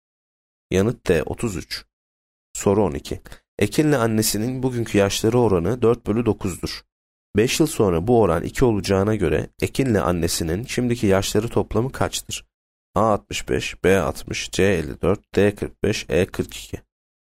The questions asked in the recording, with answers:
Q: 5 yıl sonra bu oran 2 olacağına göre Ekin'le annesinin şimdiki yaşları toplamı kaçtır?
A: Yanıt A 65.